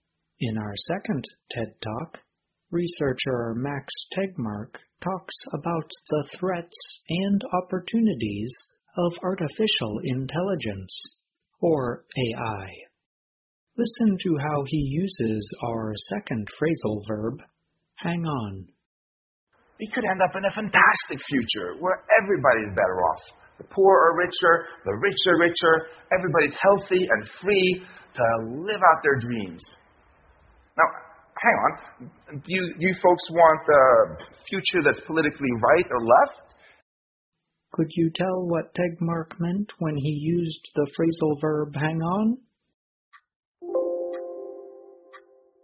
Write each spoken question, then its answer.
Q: Could you tell what Tegmark meant when he used the phrasal verb hang on?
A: hang on means wait for a short time